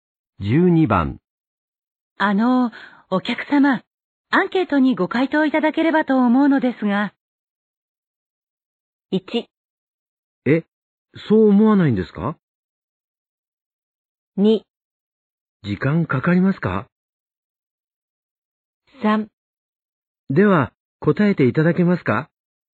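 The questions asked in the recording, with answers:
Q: お客様、アンケートにご回答いただければと思うのですが。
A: 2: 時間かかりますか?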